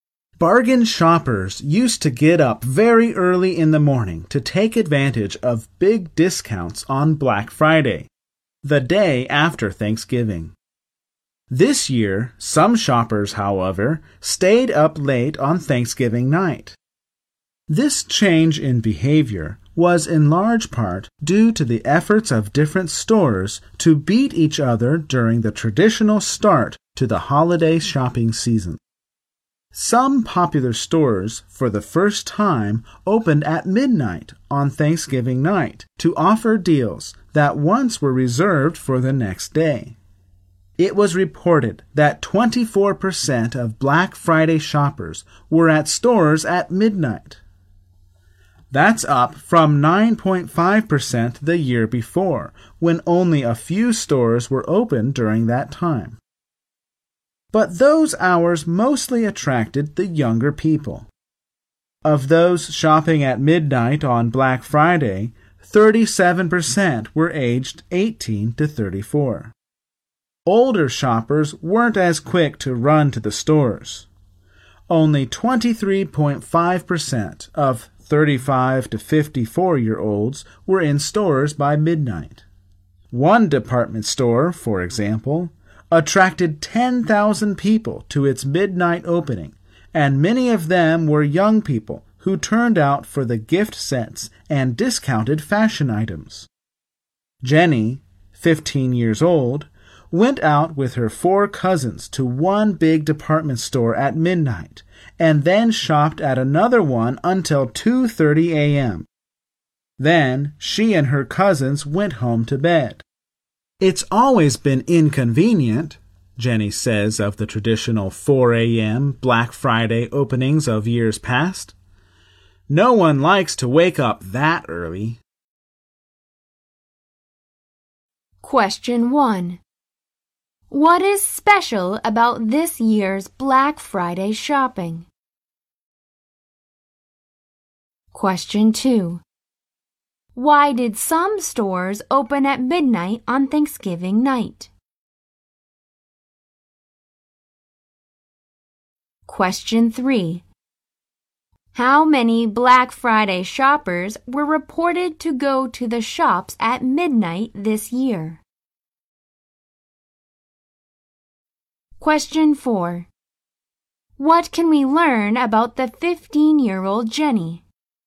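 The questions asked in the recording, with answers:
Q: What is special about this year's Black Friday shopping?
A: Some stores opened at midnight on Thanksgiving night, so shoppers stayed up late

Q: Why did some stores open at midnight on Thanksgiving night?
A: To beat their competitors

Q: How many Black Friday shoppers were reported to go to the shops at midnight this year?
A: 24%

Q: What can we learn about the 15 year old Jenny?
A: She shopped with her four cousins from midnight until 2:30 a.m.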